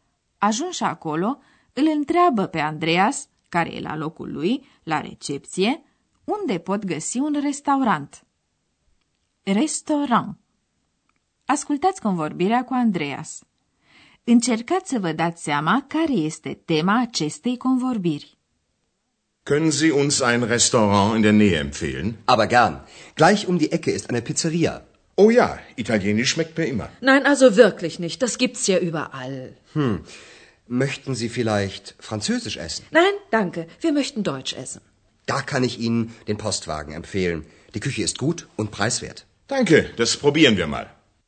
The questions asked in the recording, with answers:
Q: Încercați să vă dați seama care este tema acestei convorbiri.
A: Tema convorbirii este ce fel de bucătărie preferă soții, italiană, franceză sau germană.